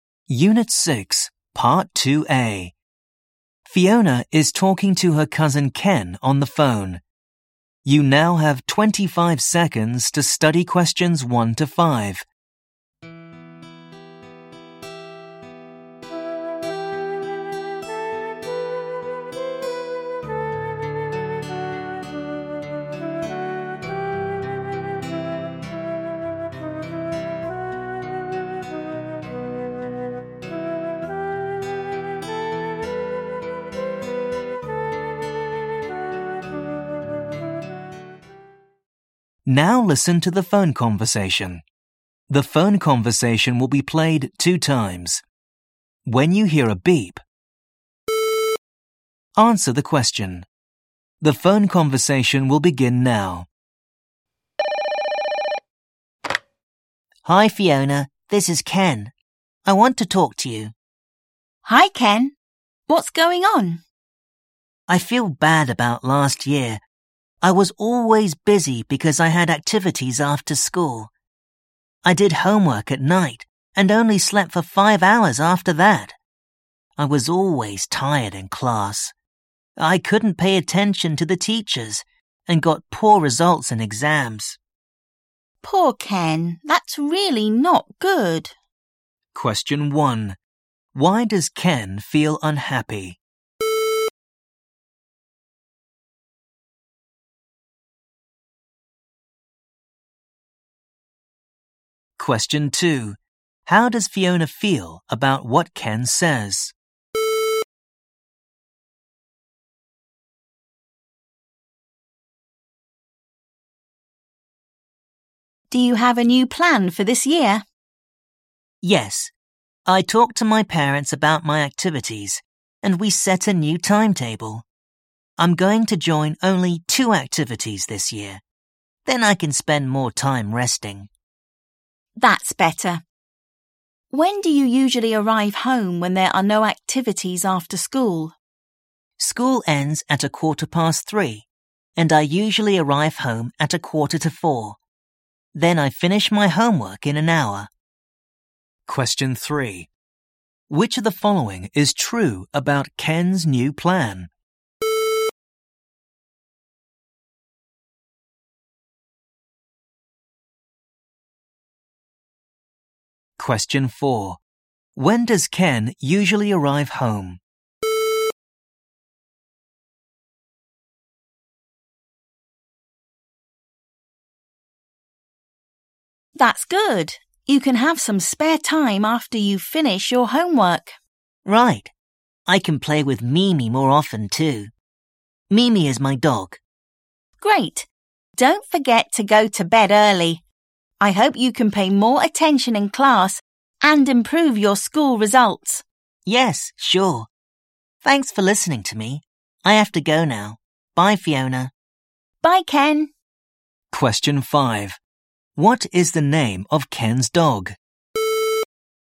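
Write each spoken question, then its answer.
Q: Why does Ken feel unhappy?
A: He was always tired and got poor exam results last year

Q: When does Ken usually arrive home?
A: At 3:45

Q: What is the name of Ken's dog?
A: Mimi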